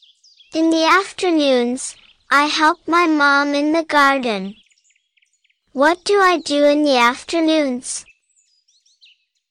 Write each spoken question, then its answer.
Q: What do I do in the afternoons?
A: I help my mom.